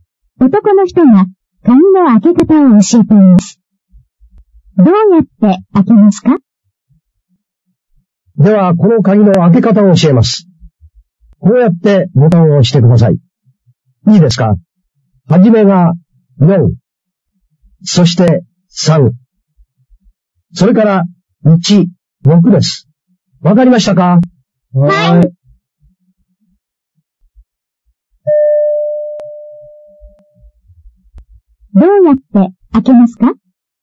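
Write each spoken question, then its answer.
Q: どうやって開けますか?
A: ボタンを4、3、1、6の順に押す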